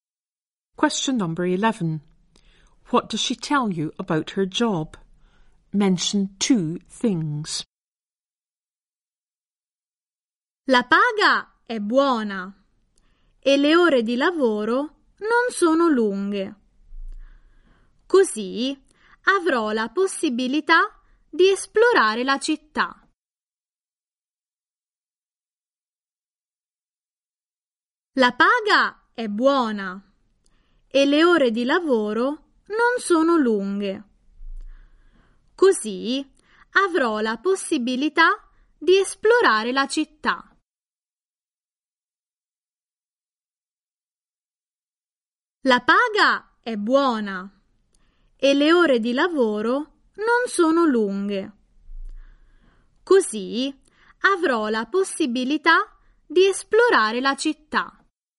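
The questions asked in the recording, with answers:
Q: What does she tell you about her job?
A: The pay is good and the hours are not long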